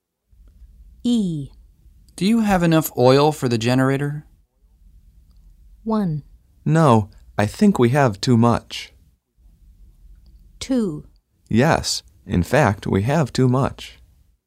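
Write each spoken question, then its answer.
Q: Do you have enough oil for the generator?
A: 2: Yes, in fact, we have too much.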